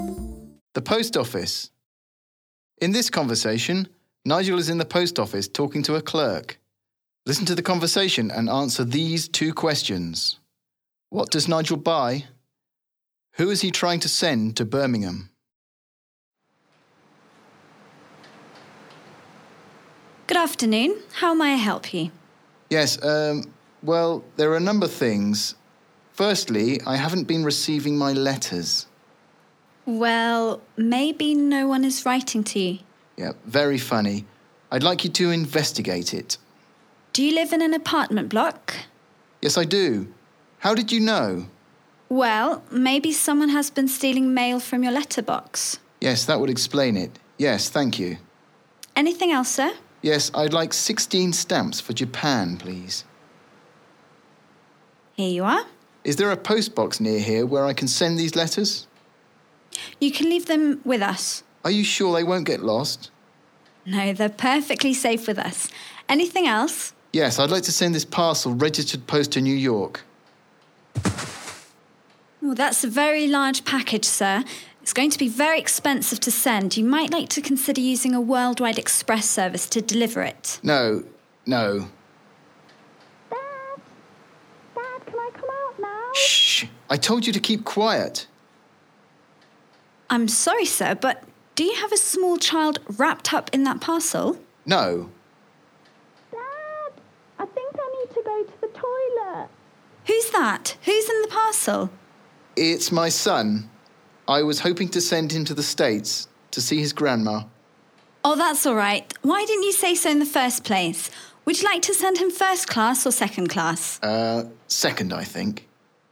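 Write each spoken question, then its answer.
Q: What does Nigel buy?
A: 16 stamps for Japan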